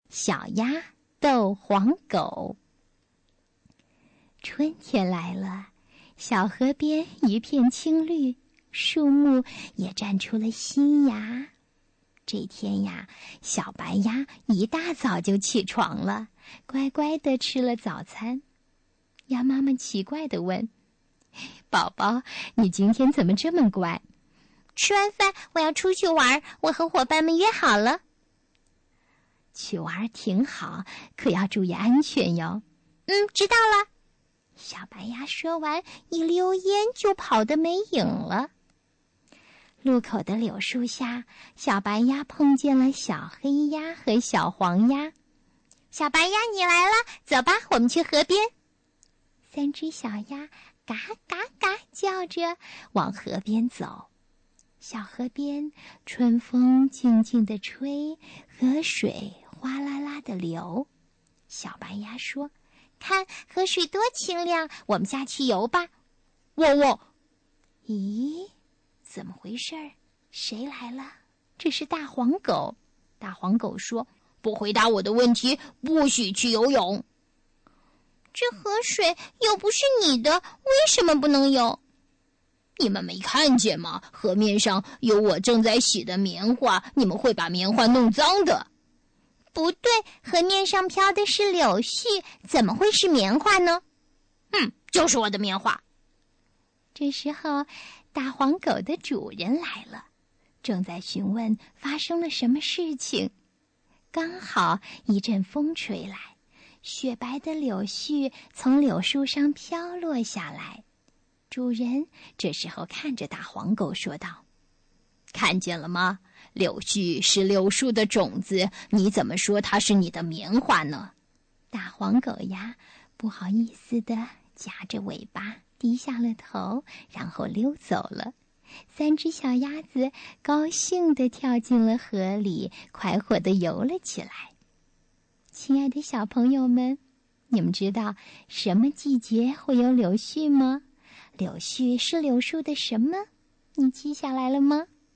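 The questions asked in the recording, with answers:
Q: 你们知道什么季节会有柳絮吗?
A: 春天

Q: 柳絮是柳树的什么?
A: 种子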